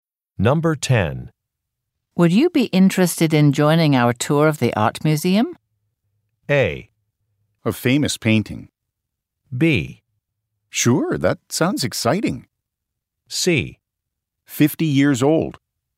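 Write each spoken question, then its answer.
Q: Would you be interested in joining our tour of the art museum?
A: B: Sure, that sounds exciting.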